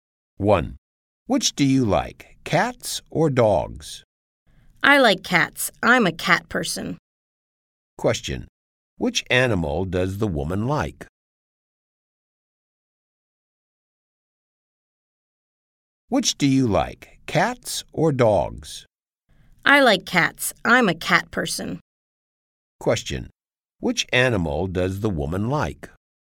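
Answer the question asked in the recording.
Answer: Cats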